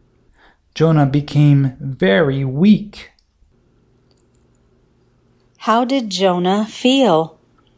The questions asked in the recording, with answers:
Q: How did Jonah feel?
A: Jonah felt very weak.